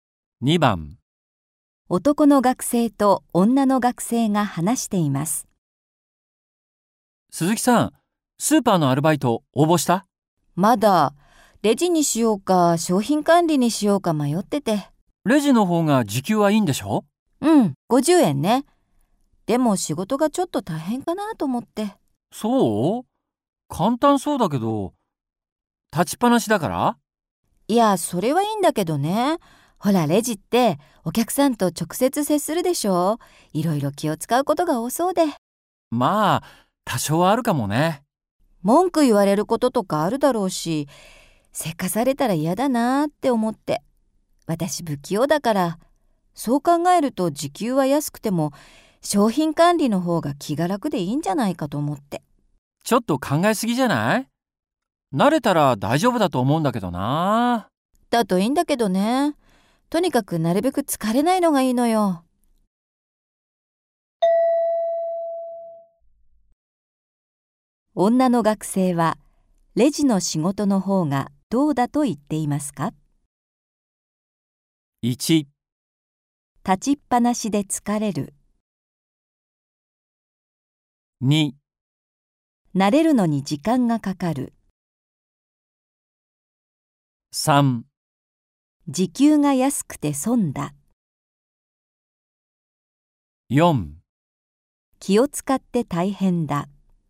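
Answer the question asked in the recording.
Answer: 4: 気を使って大変だ。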